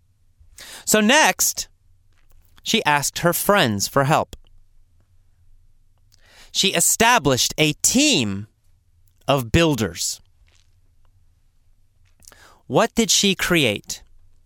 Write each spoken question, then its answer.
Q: What did she create?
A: Well, she created a team of builders, a building team.